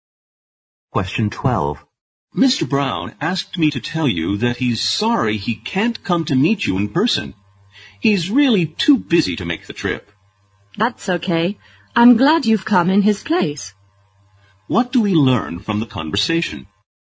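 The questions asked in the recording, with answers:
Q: What do we learn from the conversation?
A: Mr. Brown was too busy to come, so someone came in his place.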